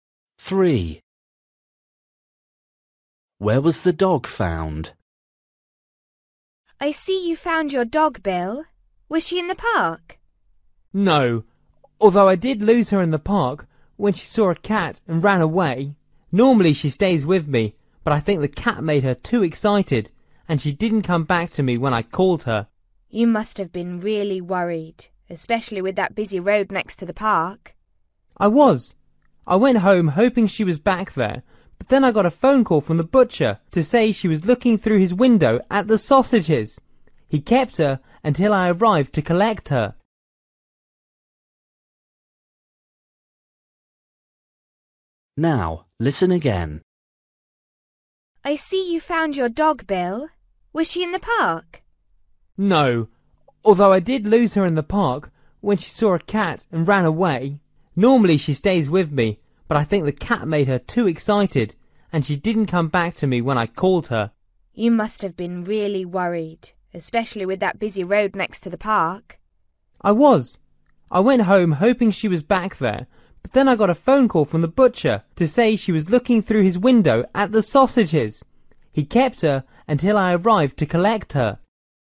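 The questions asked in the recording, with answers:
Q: Where was the dog found?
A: at the butcher's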